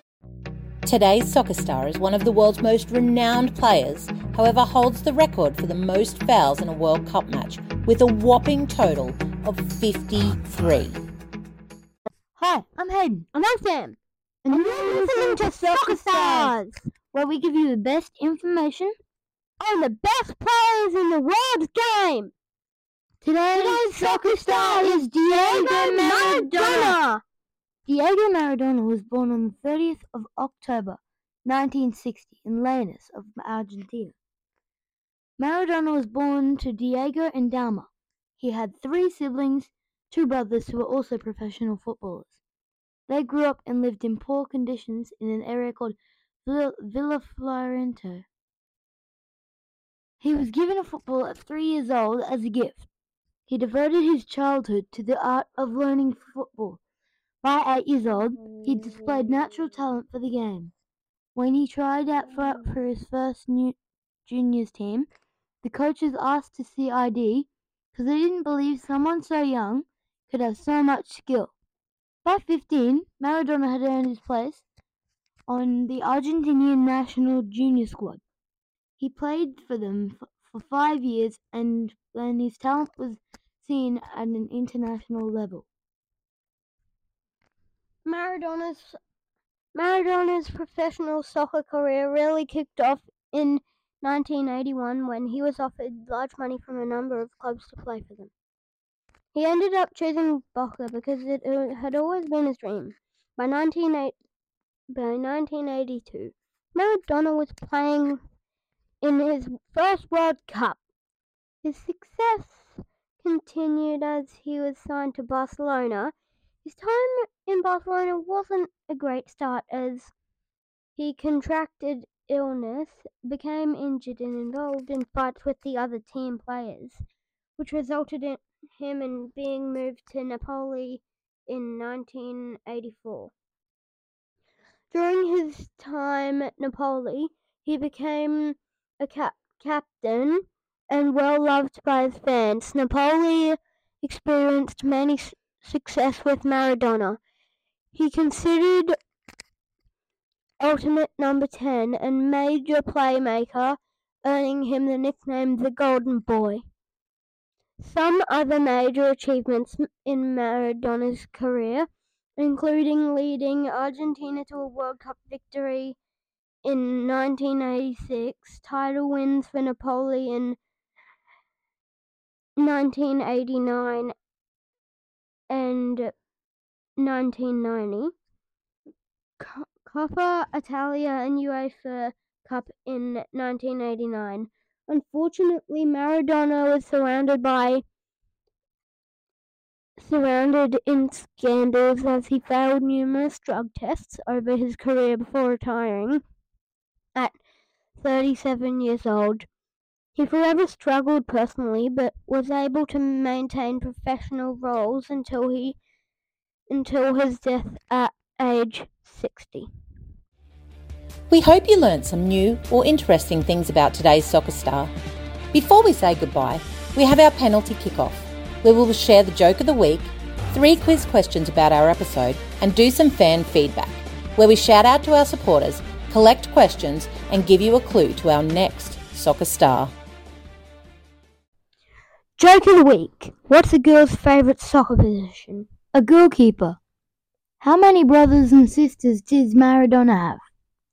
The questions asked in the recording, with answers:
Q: How many brothers and sisters does Maradona have?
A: You guessed it, 3.